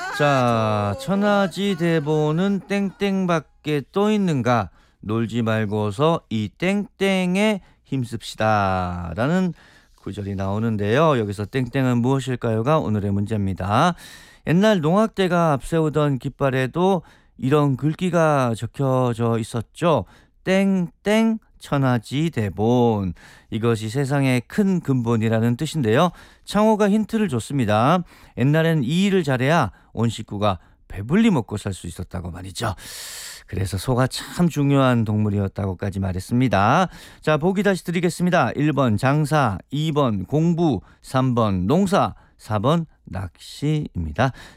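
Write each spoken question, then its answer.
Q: 여기서 땡땡은 무엇일까요가 오늘의 문제입니다.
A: 3: 농사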